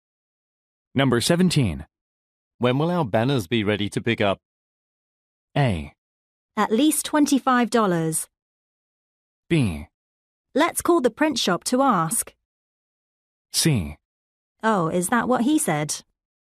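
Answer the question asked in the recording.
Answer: B: Let's call the print shop to ask.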